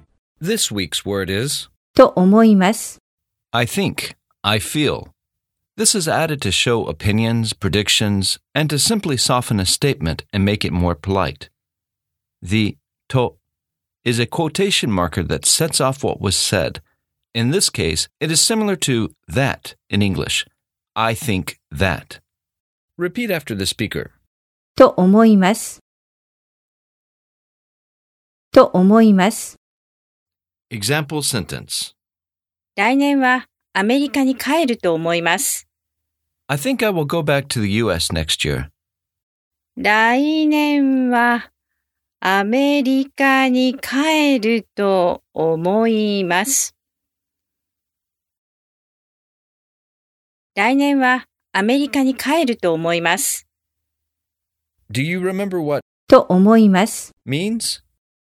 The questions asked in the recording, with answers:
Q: Do you remember what と思います means?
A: I think, I feel.